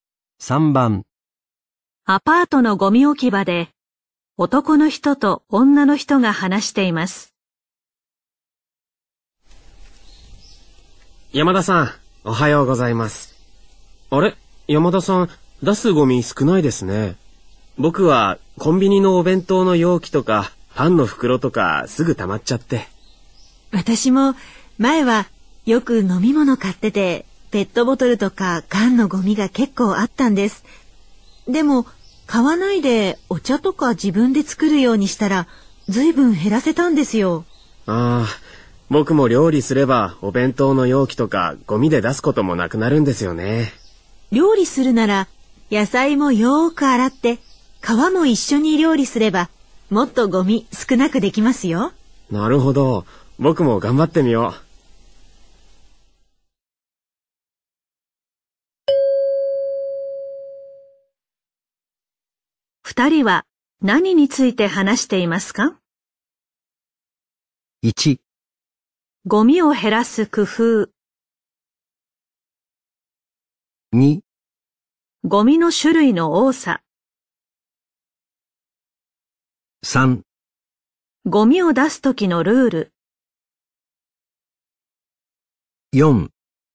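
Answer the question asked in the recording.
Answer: 1: ゴミを減らす工夫。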